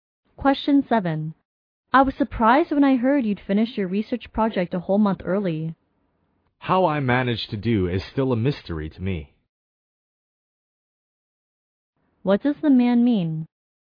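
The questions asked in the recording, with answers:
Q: What does the man mean?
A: He doesn't know how he managed to finish so early.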